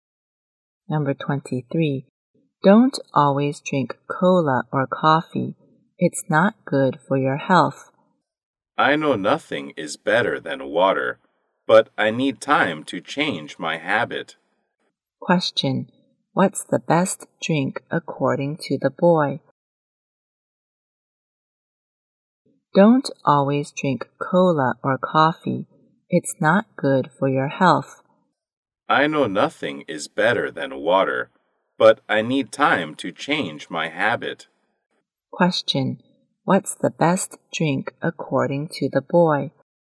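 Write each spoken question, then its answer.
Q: Question. What's the best drink according to the boy?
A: Water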